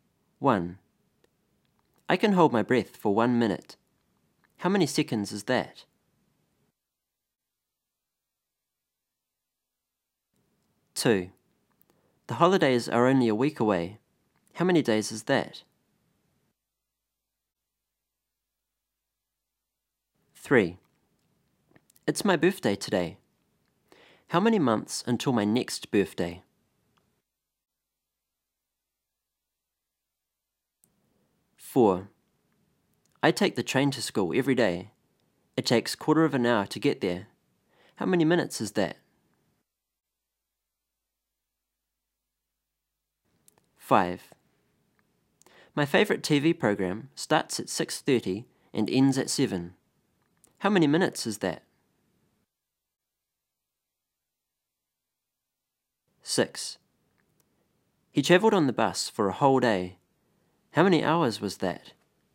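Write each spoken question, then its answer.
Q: How many seconds is that?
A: 60

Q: How many months until my next birthday?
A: 12

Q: How many minutes is that?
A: 15

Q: How many minutes is that?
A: 30

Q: How many hours was that?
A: 24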